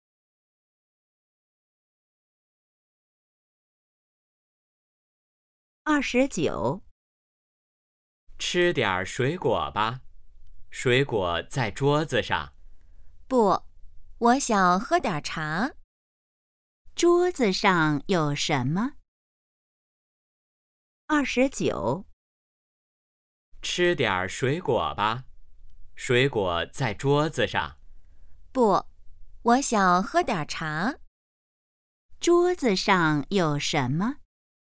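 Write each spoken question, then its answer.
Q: 桌子上有什么?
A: 水果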